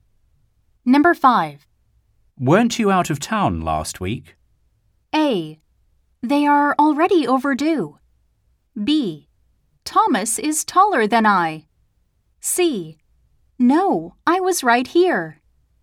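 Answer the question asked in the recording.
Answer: C: No, I was right here.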